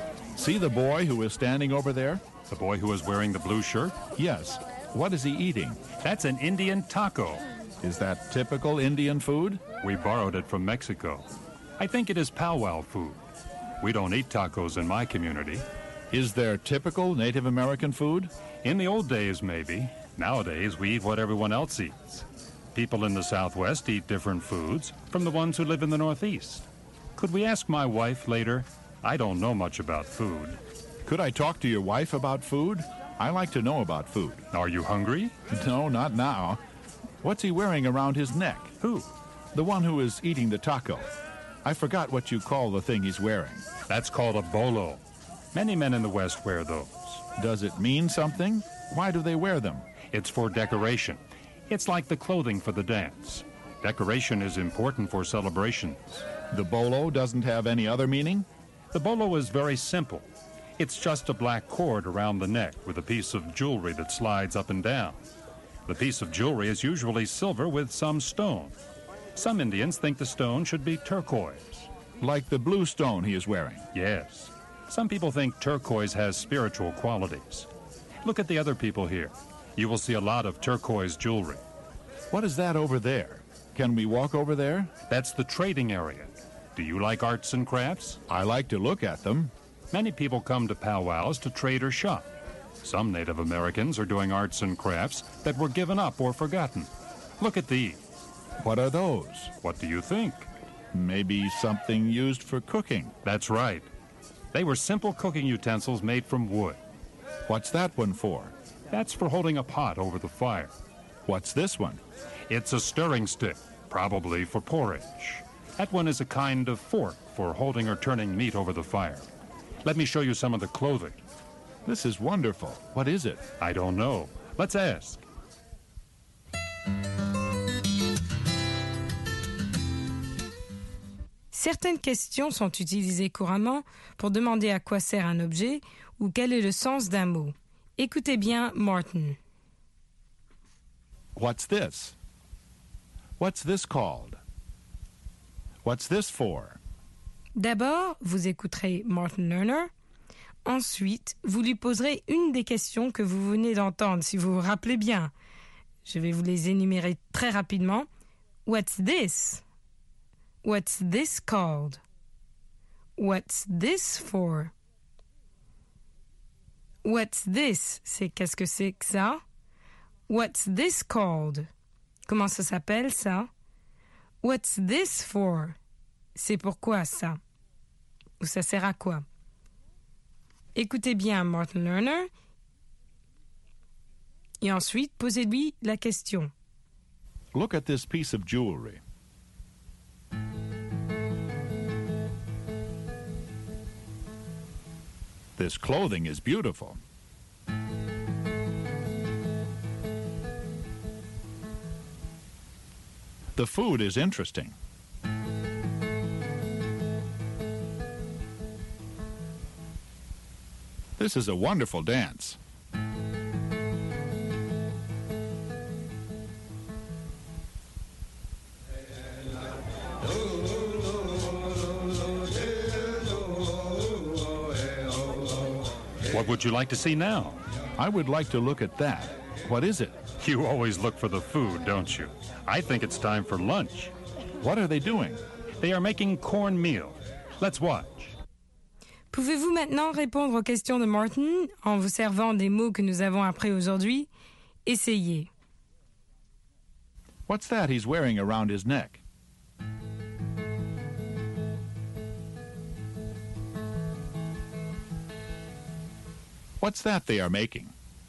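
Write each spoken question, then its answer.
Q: What's that he's wearing around his neck?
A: A bolo

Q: What's that they are making?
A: Cornmeal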